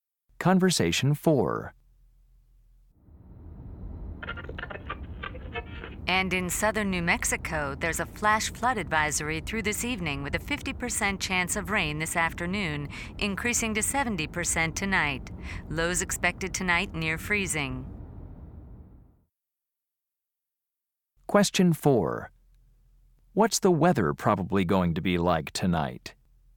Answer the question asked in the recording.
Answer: It's going to be really rainy and cold tonight.